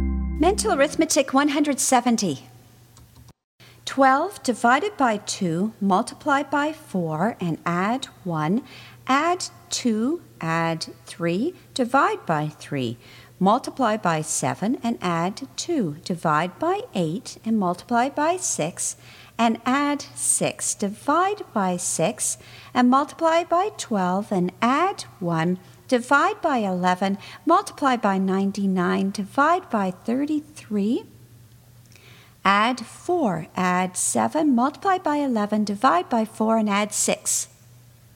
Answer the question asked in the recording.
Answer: 127.